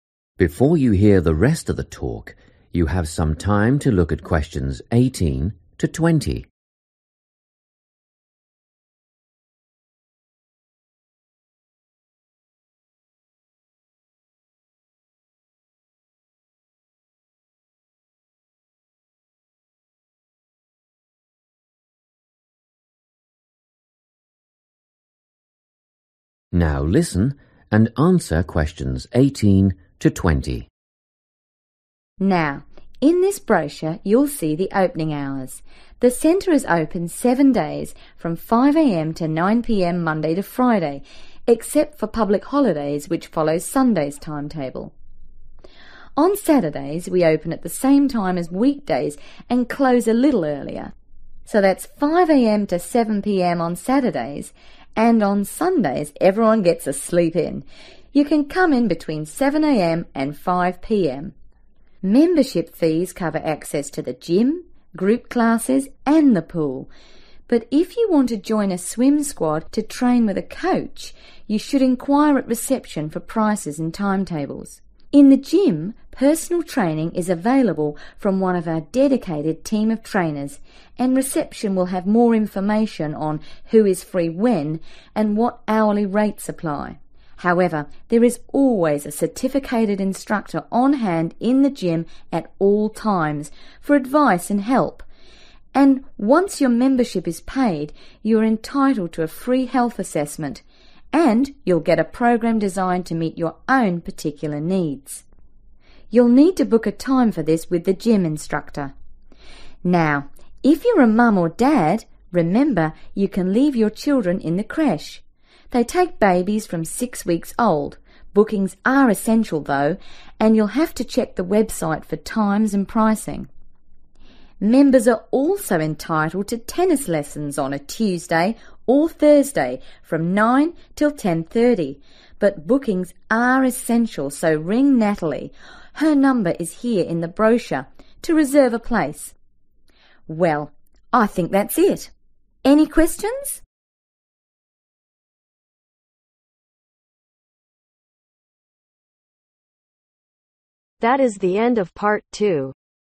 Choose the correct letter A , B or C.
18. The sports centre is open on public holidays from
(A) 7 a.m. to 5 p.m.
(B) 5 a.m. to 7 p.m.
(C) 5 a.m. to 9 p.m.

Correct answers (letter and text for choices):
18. (A) 7 a.m. to 5 p.m.